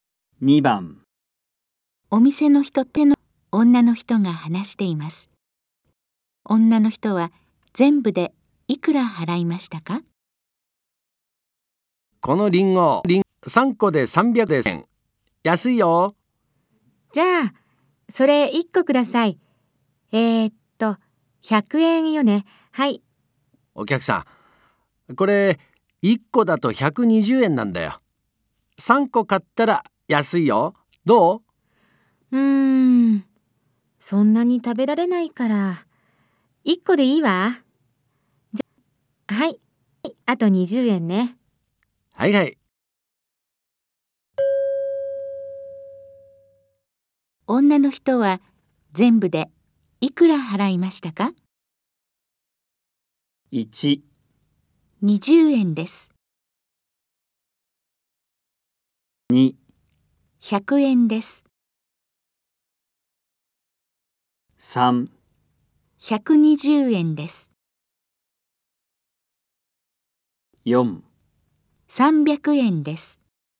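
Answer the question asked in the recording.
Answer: 3: 120円です。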